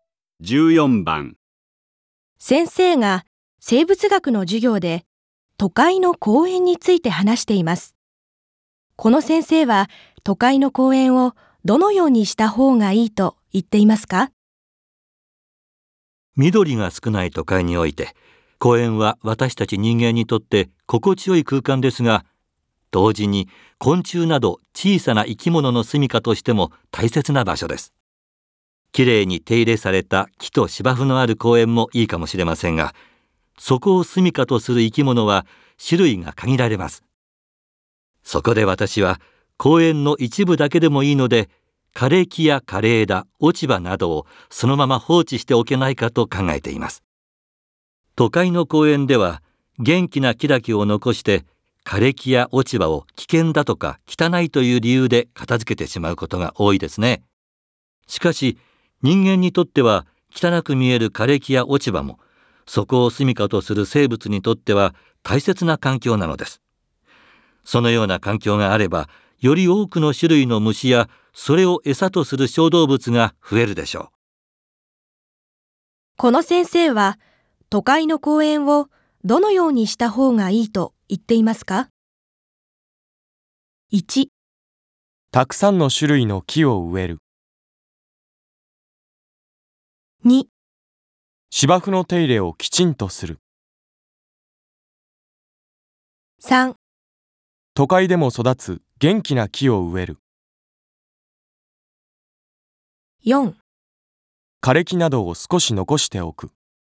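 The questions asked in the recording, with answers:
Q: この先生は都会の公園をどのようにした方がいいと言っていますか?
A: 4: 枯れ木などを少し残しておく。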